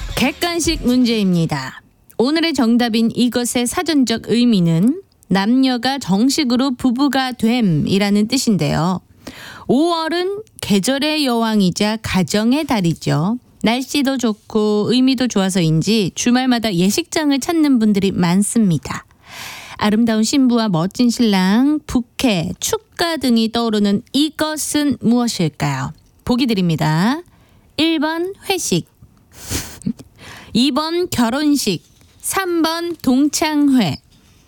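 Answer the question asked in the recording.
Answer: 2: 결혼식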